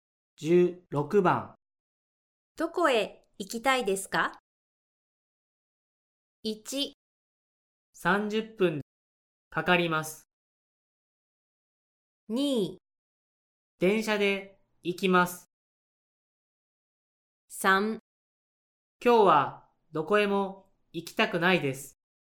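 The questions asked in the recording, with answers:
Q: どこへ行きたいですか?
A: 3: 今日はどこへも行きたくないです。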